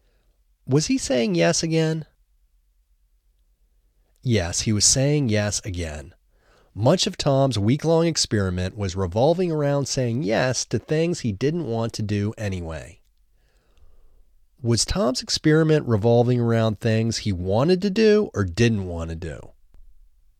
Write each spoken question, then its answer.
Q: Was Tom's experiment revolving around things he wanted to do or didn't want to do?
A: Tom's experiment was revolving around things he didn't want to do.